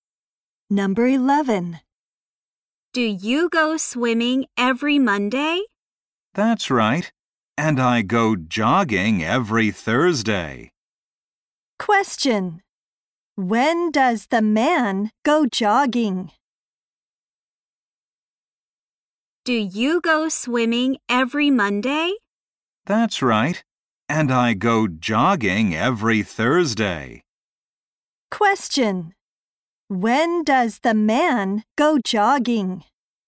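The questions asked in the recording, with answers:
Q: When does the man go jogging?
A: Every Thursday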